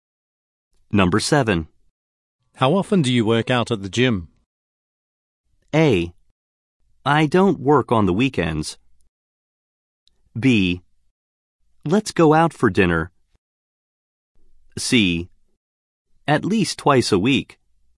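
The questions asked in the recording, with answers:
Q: How often do you work out at the gym?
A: C: at least twice a week.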